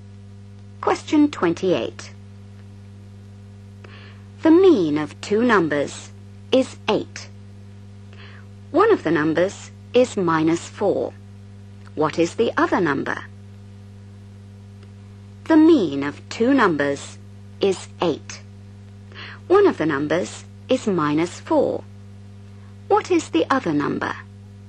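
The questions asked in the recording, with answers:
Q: What is the other number?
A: 20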